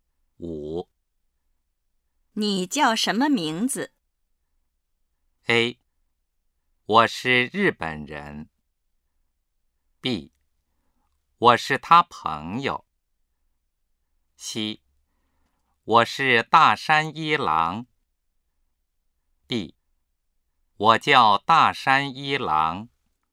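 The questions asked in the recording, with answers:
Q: 你叫什么名字?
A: D: 我叫大山一郎。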